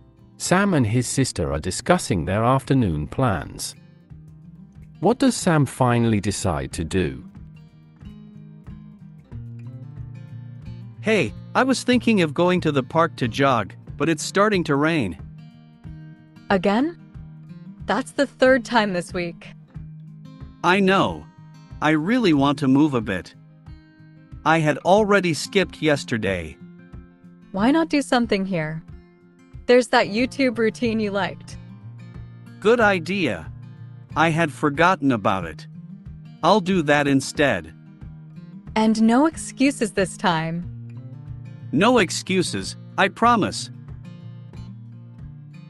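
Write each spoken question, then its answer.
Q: What does Sam finally decide to do?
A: Do a YouTube workout routine at home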